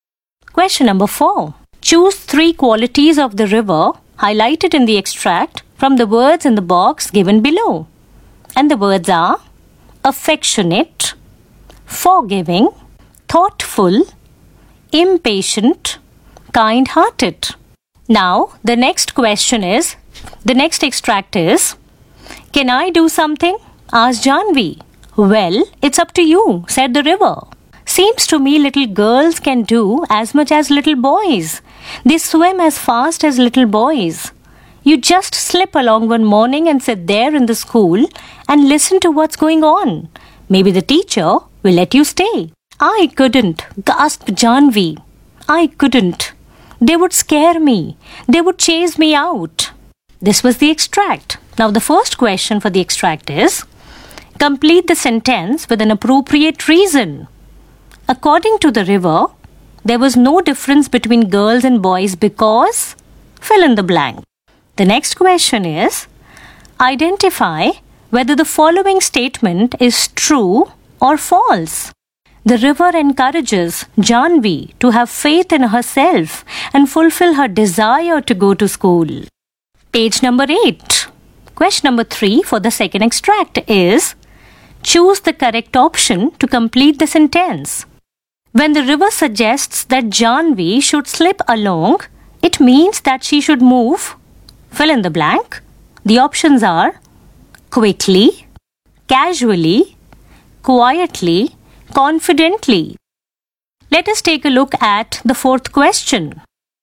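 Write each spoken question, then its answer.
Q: According to the river, there was no difference between girls and boys because, fill in the blank.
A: little girls can do as much as little boys and swim as fast as them

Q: The river encourages Janvi to have faith in herself and fulfill her desire to go to school.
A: True

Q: When the river suggests that Janvi should slip along, it means that she should move.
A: quietly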